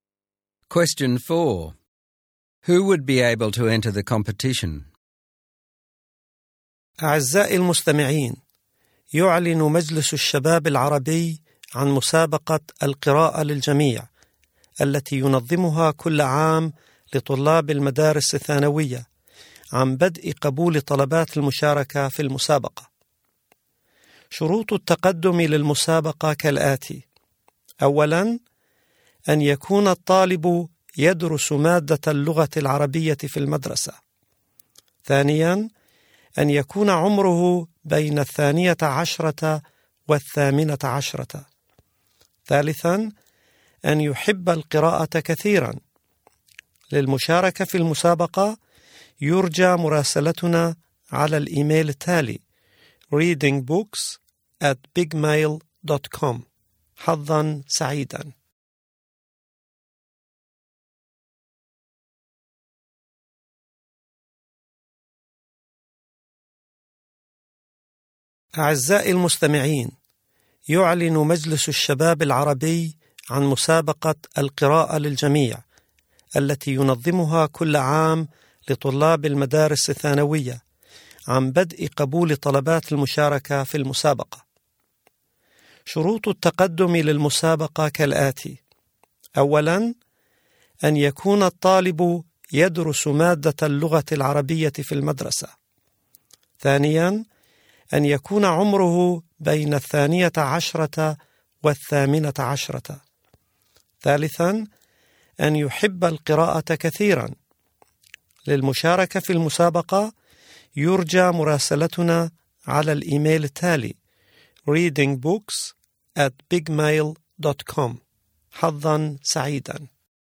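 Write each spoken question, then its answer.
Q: Who would be able to enter the competition?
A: High school students aged 12 to 18 who study Arabic at school and love reading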